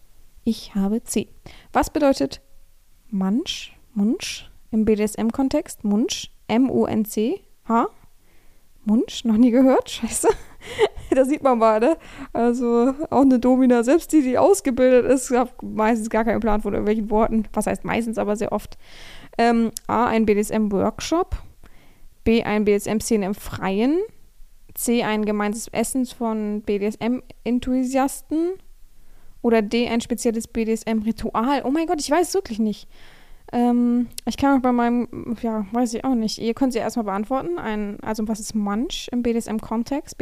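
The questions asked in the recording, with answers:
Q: Was bedeutet Munch?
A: C: ein gemeinsames Essen von BDSM-Enthusiasten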